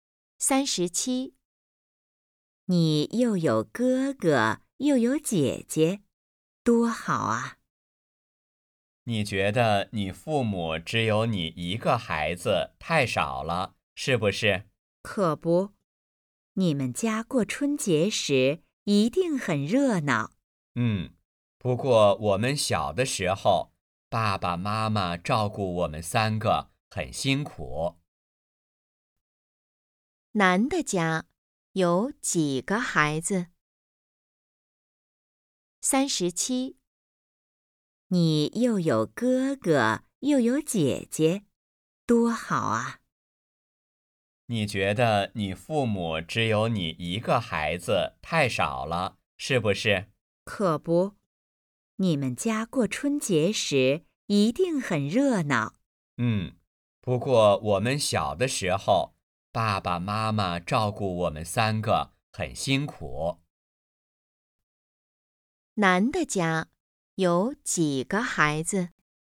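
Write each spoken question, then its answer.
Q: 男的家有几个孩子?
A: 三个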